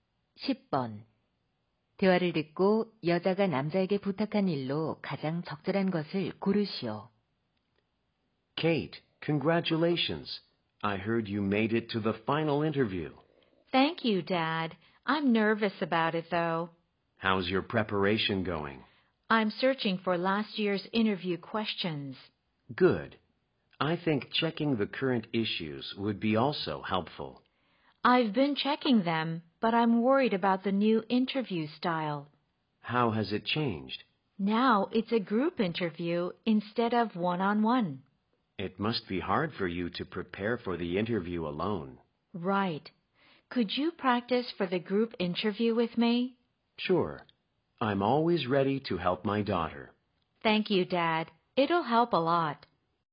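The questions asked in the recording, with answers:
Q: 대화를 듣고 여자가 남자에게 부탁한 일로 가장 적절한 것을 고르시오.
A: 그룹 면접 연습을 함께 해 주기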